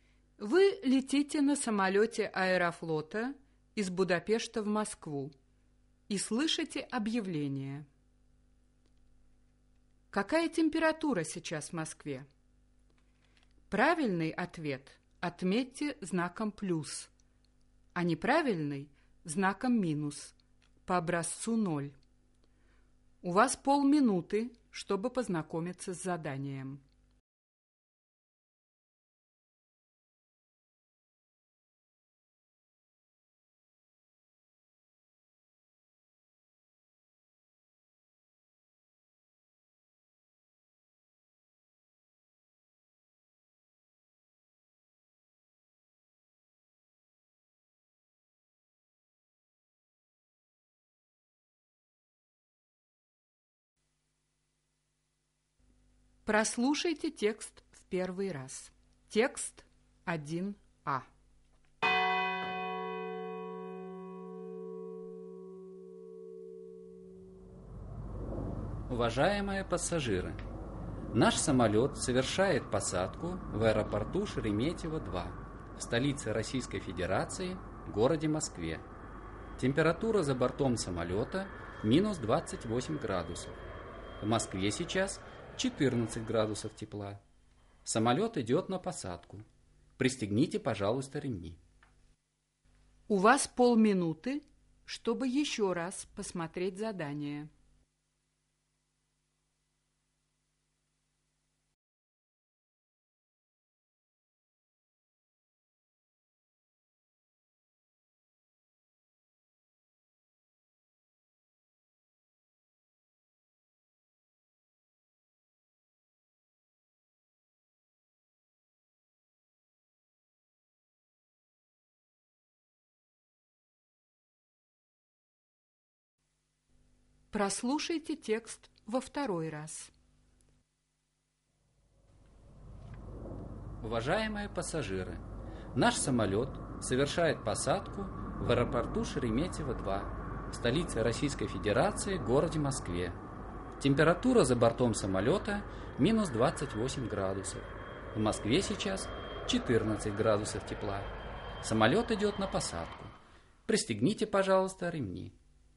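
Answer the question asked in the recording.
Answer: 14 градусов тепла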